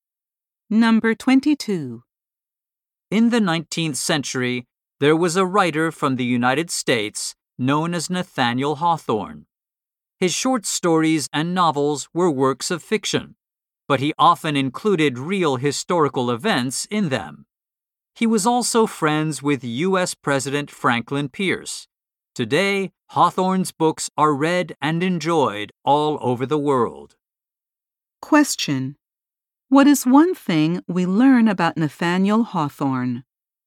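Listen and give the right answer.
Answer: He included real historical events in his fiction.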